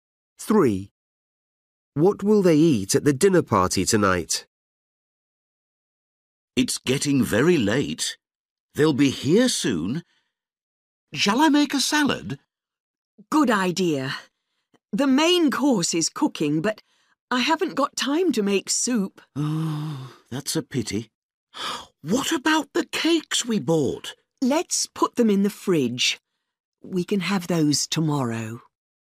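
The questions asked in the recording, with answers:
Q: What will they eat at the dinner party tonight?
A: Salad and the main course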